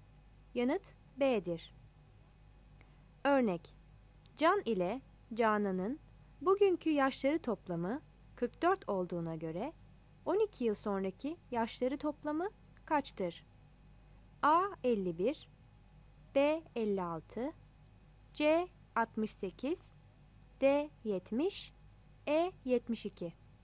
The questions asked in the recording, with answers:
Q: Can ile Canan'ın bugünkü yaşları toplamı 44 olduğuna göre 12 yıl sonraki yaşları toplamı kaçtır?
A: Yanıt C'dir.